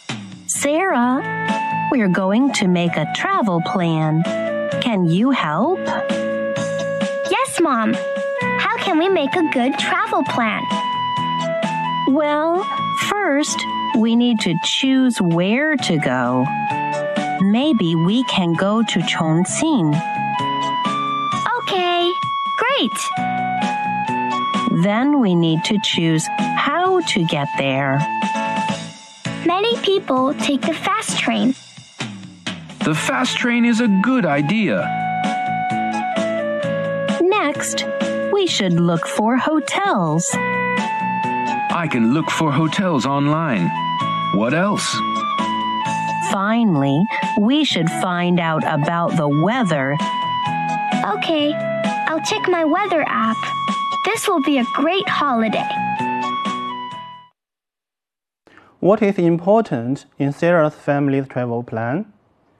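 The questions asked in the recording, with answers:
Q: What is important in Sarah's family's travel plan?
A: Choosing where to go, choosing how to get there, looking for hotels and finding out about the weather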